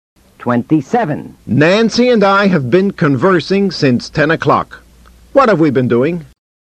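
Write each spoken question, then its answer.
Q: What have we been doing?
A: Conversing (talking) since 10 o'clock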